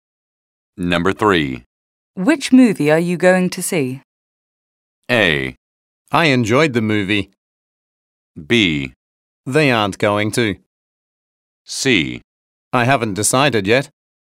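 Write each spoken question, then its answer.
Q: Which movie are you going to see?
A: C: I haven't decided yet.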